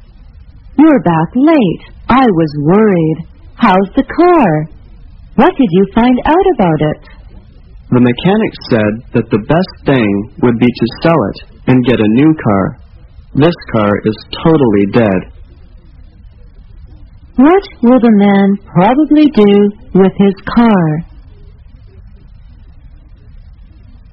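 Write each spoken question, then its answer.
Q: What will the man probably do with his car?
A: Sell it and buy a new car.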